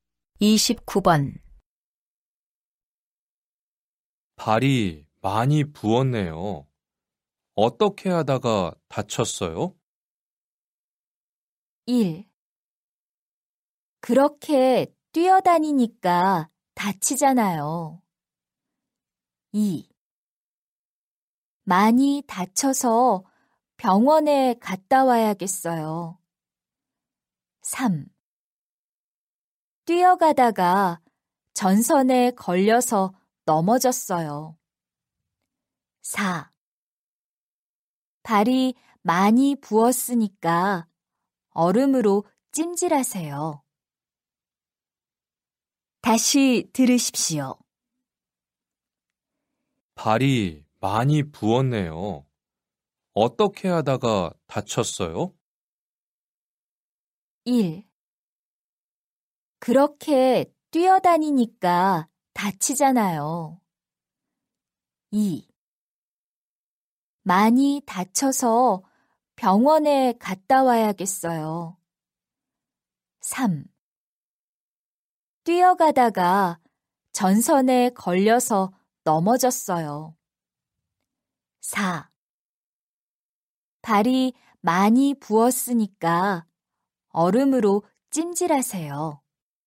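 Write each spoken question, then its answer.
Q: 발이 많이 부었네요. 어떻게 하다가 다쳤어요?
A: 3: 뛰어가다가 전선에 걸려서 넘어졌어요.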